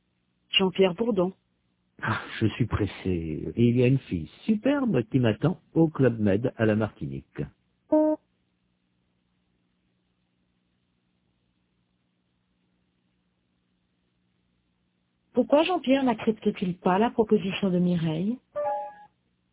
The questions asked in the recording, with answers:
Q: Pourquoi Jean-Pierre n'accepte-t-il pas la proposition de Mireille?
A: Parce qu'il est pressé.